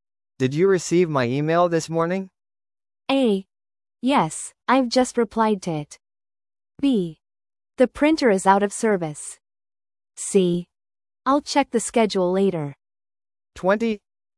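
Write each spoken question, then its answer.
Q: Did you receive my email this morning?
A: A: Yes, I've just replied to it.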